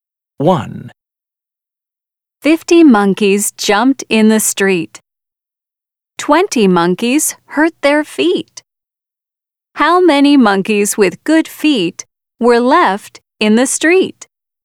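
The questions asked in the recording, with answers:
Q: How many monkeys with good feet were left in the street?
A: 30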